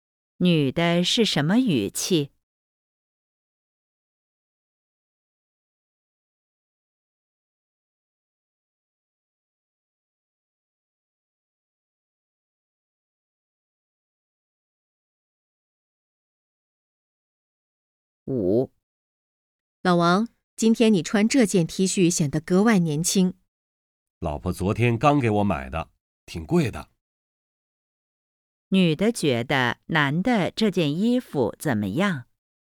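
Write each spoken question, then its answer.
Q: 女的觉得男的这件衣服怎么样?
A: 穿着显得格外年轻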